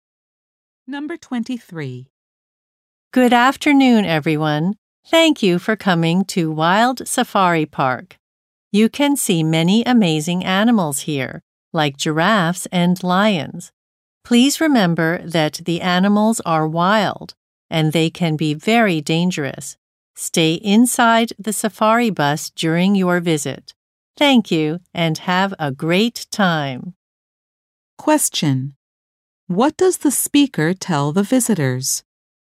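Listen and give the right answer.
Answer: Stay inside the safari bus.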